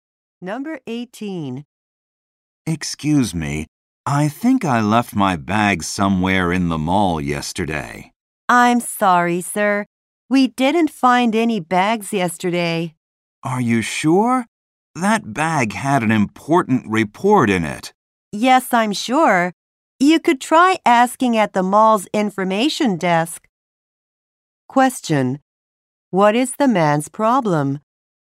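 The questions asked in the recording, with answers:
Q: What is the man's problem?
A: He lost his bag with an important report in it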